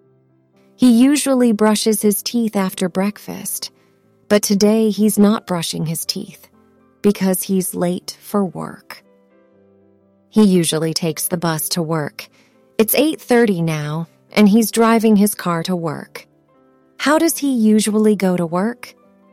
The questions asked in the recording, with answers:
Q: How does he usually go to work?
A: By bus.